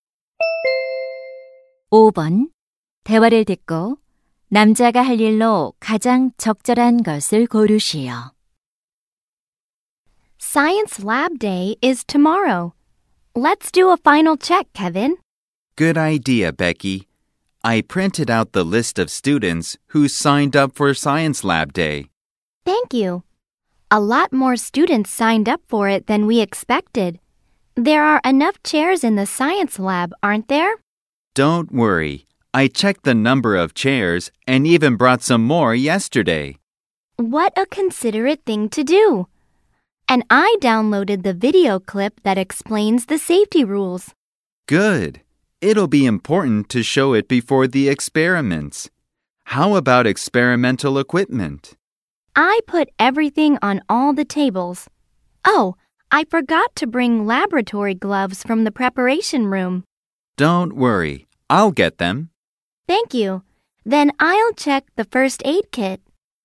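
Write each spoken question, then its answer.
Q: 대화를 듣고 남자가 할 일로 가장 적절한 것을 고르시오.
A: 준비실에서 실험용 장갑 가져오기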